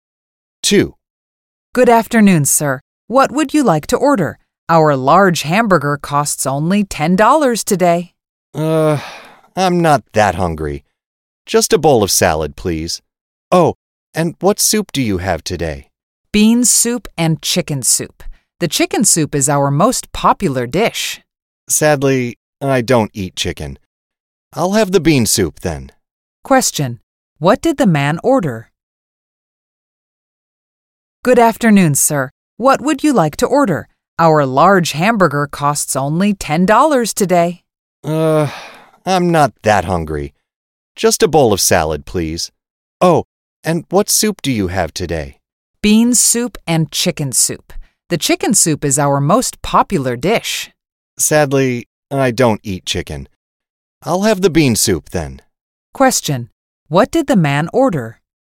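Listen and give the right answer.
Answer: A bowl of salad and bean soup.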